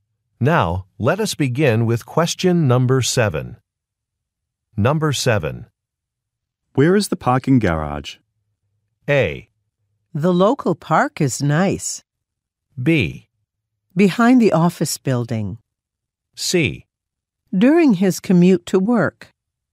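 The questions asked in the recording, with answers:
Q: Where is the parking garage?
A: B: Behind the office building.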